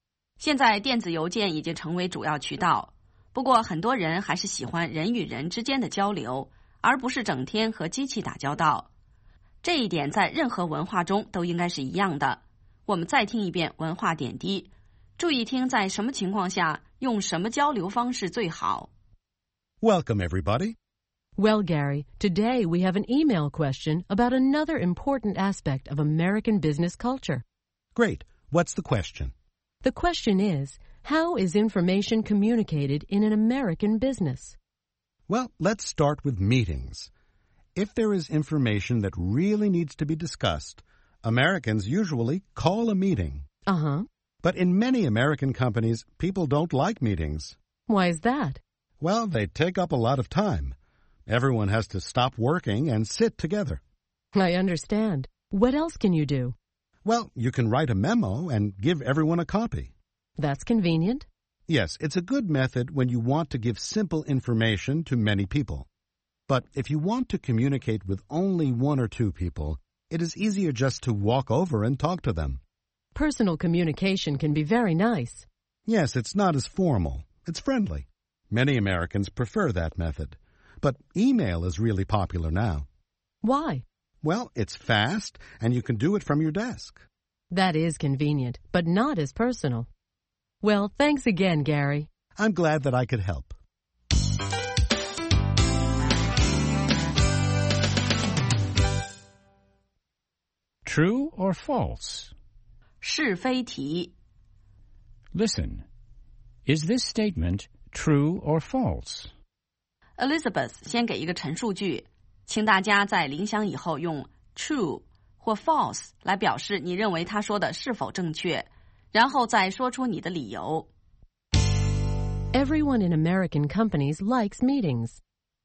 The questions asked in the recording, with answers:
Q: Everyone in American companies likes meetings.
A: False.Many people think that meetings take up too much time.